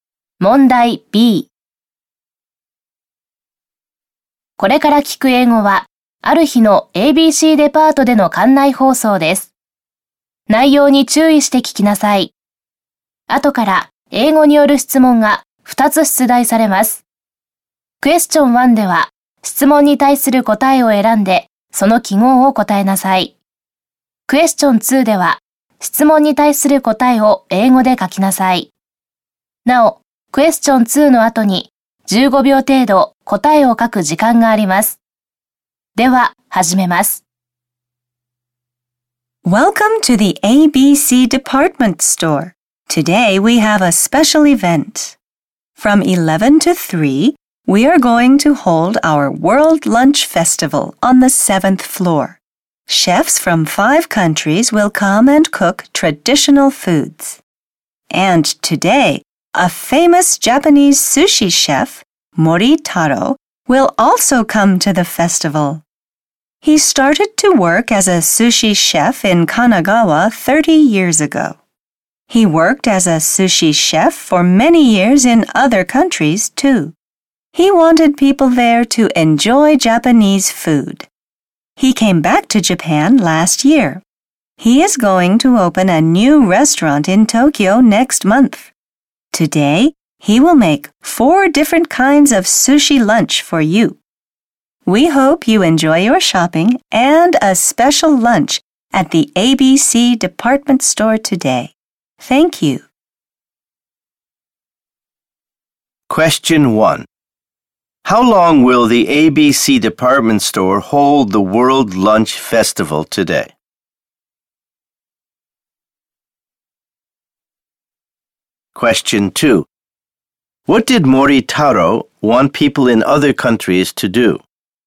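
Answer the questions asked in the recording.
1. For four hours (from 11 to 3)
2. He wanted them to enjoy Japanese food.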